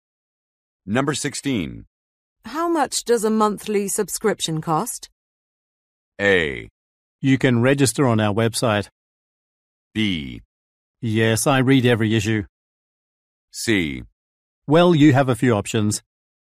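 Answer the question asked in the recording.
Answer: C: Well, you have a few options.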